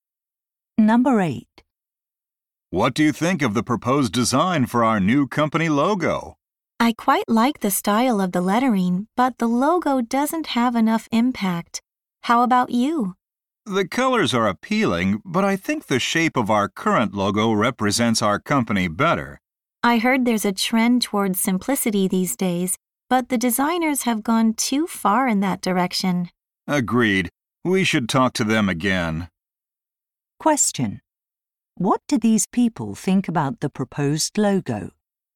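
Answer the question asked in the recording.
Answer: It is too simple and lacks impact.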